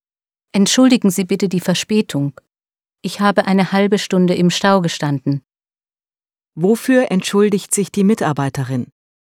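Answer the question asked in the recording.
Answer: Für ihre Verspätung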